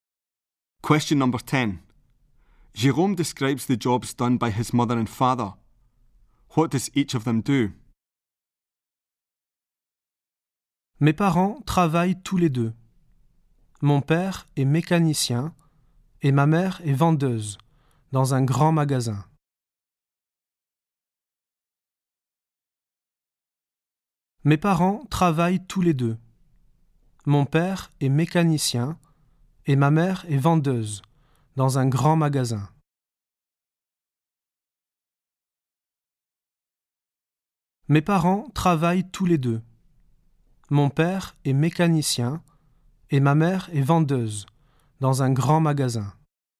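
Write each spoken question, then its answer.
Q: What does each of them do?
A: Father is a mechanic; mother is a sales assistant in a department store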